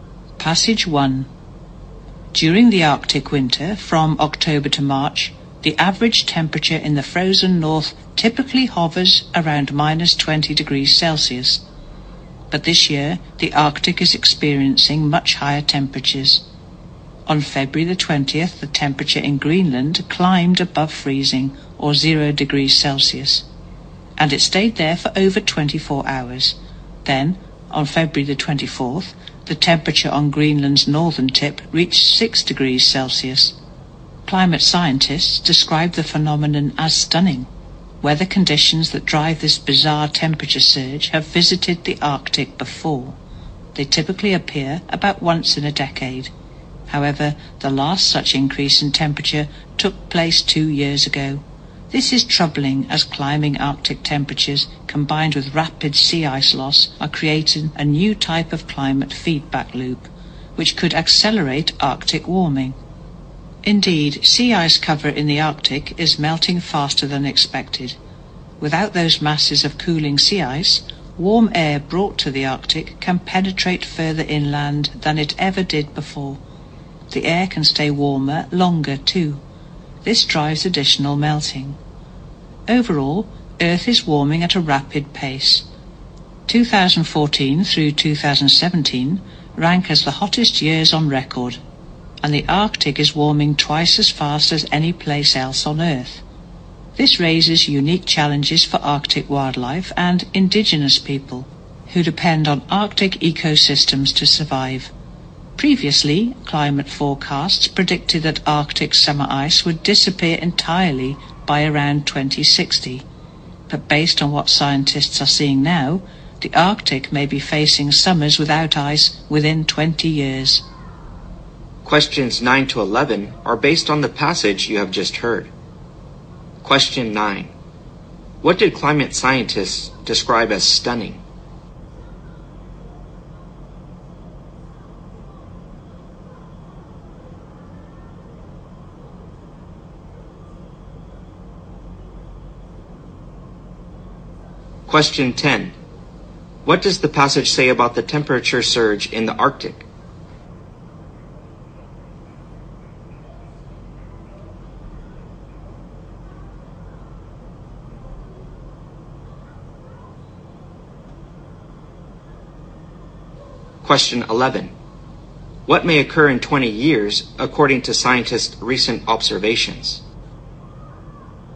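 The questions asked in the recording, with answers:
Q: What did climate scientists describe as stunning?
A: The unusually high Arctic winter temperatures

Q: What may occur in 20 years according to scientists' recent observations?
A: Arctic summers without ice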